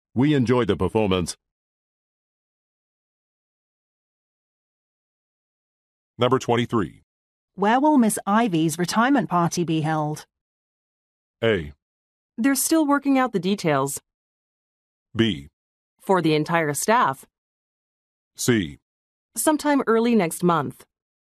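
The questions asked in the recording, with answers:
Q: Where will Miss Ivy's retirement party be held?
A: A: They're still working out the details.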